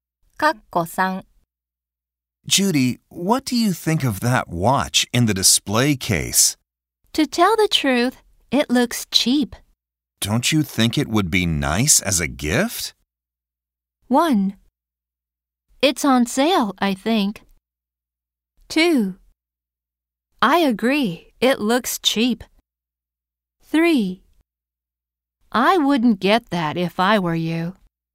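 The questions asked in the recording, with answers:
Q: Don't you think it would be nice as a gift?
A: 3: I wouldn't get that if I were you.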